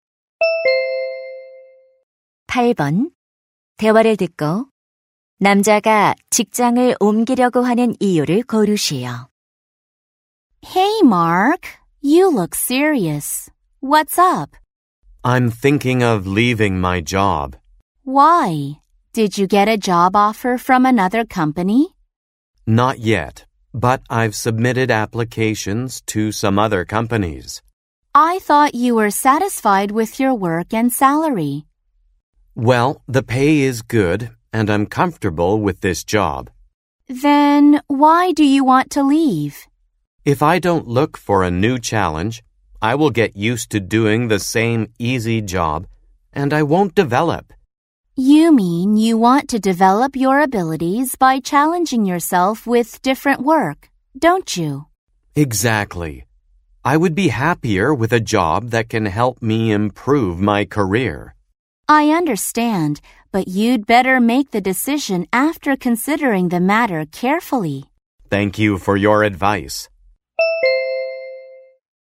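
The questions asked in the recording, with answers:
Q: 대화를 듣고 남자가 직장을 옮기려고 하는 이유를 고르시오.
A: 새로운 일에 도전하며 능력을 키우고 싶어서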